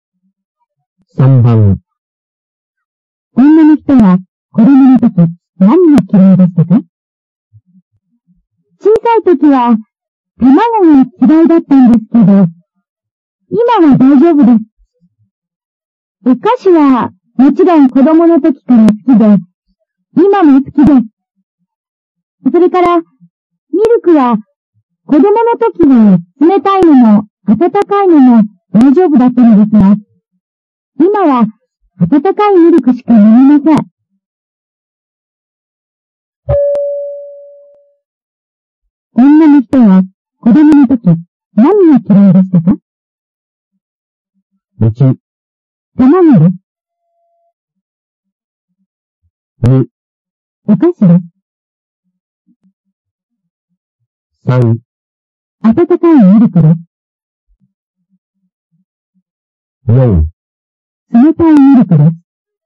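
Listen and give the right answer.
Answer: 1: 卵です。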